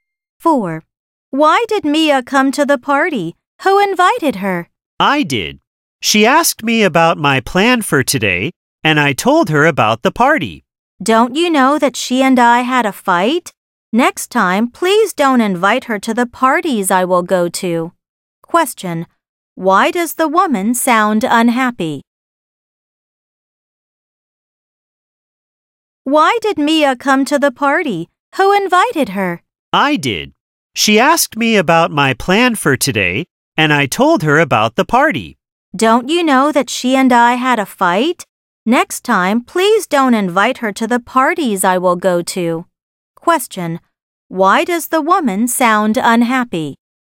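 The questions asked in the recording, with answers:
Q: Why does the woman sound unhappy?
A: Mia, whom she had a fight with, came to the party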